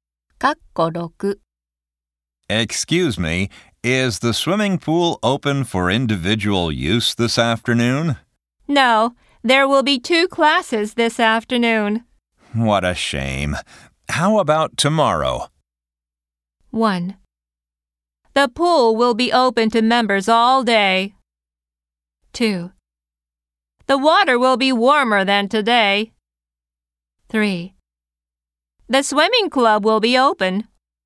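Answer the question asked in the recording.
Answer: 1: The pool will be open to members all day.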